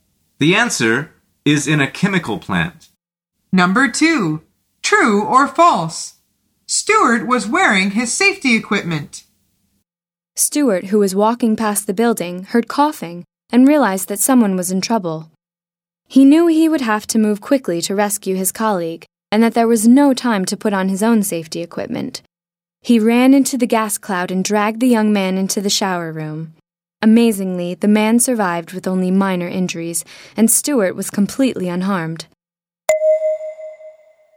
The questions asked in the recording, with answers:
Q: True or false? Stuart was wearing his safety equipment.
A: The answer is false.